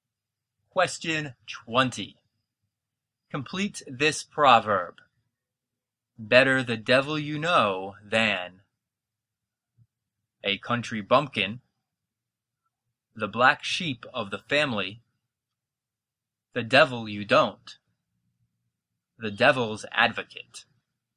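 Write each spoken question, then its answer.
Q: Complete this proverb.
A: C: the devil you don't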